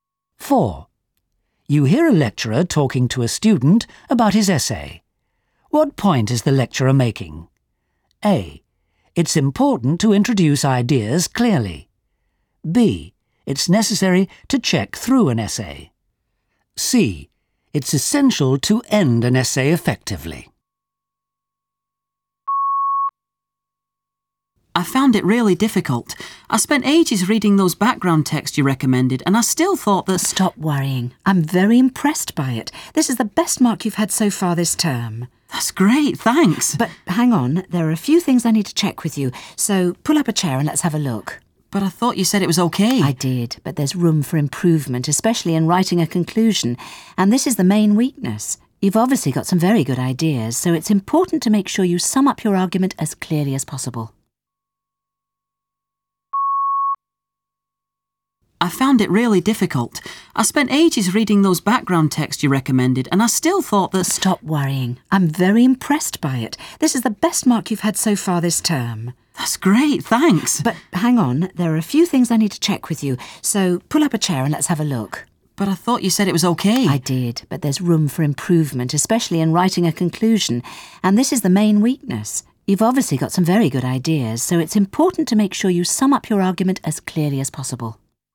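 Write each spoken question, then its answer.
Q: What point is the lecturer making?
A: C: It's essential to end an essay effectively.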